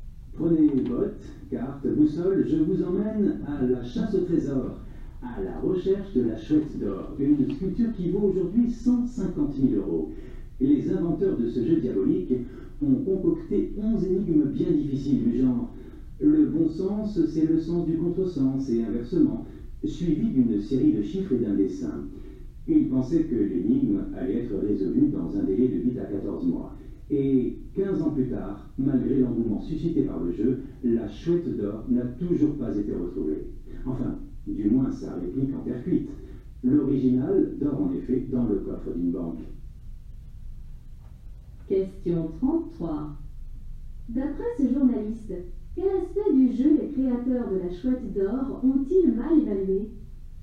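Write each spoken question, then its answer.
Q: D'après ce journaliste, quel aspect du jeu les créateurs de la chouette d'or ont-ils mal évalué ?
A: Le temps nécessaire pour résoudre l'énigme (ils pensaient 8 à 14 mois ; 15 ans après, la chouette n'est toujours pas retrouvée)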